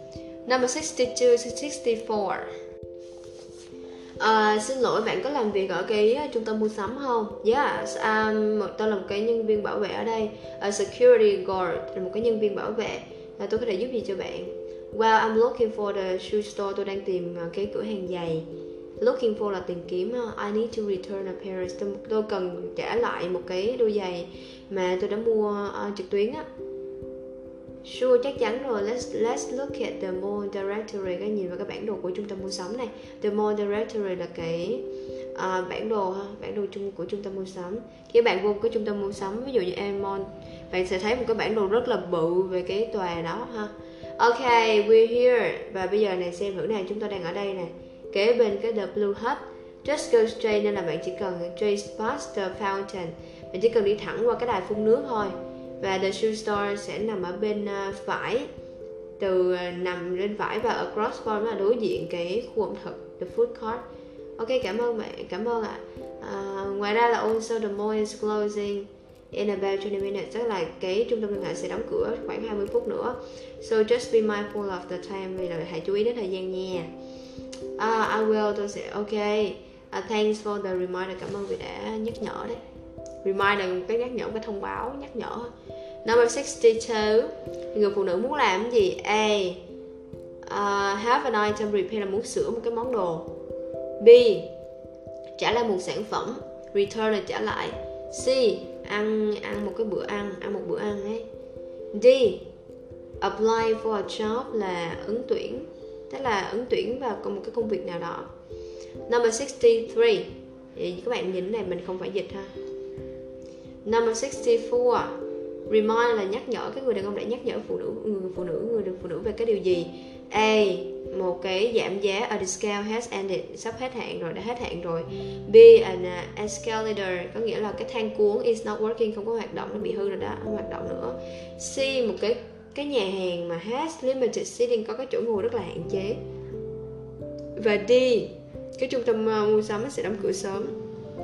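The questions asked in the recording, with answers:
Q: Number 62, người phụ nữ muốn làm cái gì?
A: B: trả lại một sản phẩm

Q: Number 64, remind là nhắc nhở, cái người đàn ông đã nhắc nhở người phụ nữ về cái điều gì.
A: D: trung tâm mua sắm sẽ đóng cửa sớm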